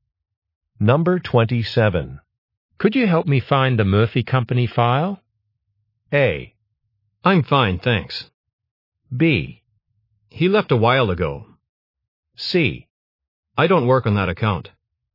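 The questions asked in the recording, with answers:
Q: Could you help me find the Murphy Company file?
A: C: I don't work on that account.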